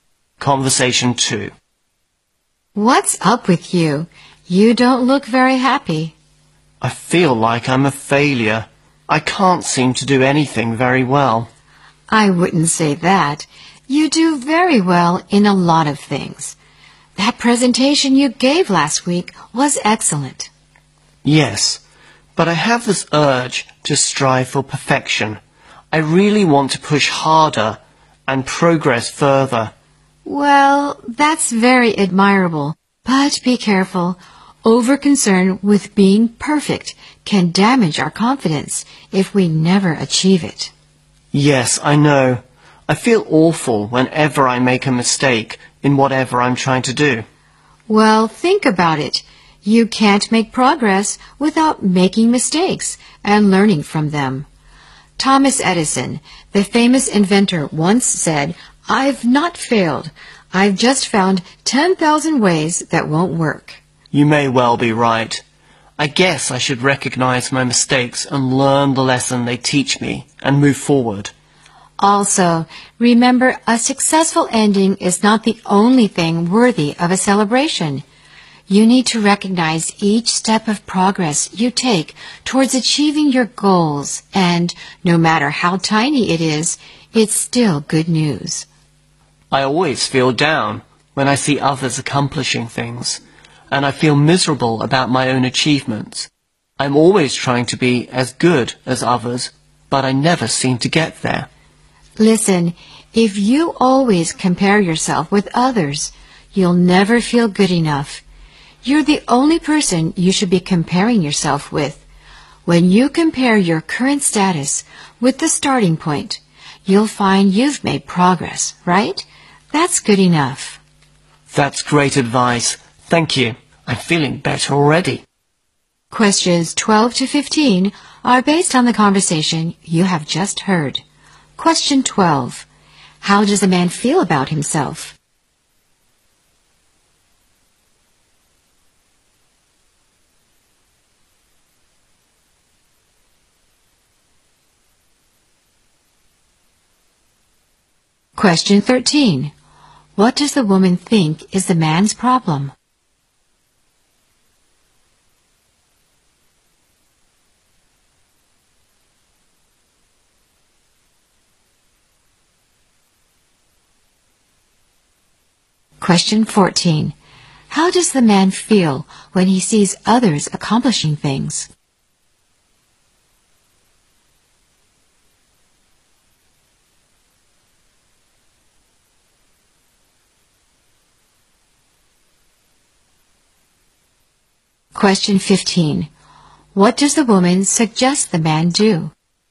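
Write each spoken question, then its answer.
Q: How does a man feel about himself?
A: He feels like a failure

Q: What does the woman think is the man's problem?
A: He is over-concerned with being perfect

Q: How does the man feel when he sees others accomplishing things?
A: Down and miserable about his own achievements

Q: What does the woman suggest the man do?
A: Compare himself only with himself, not others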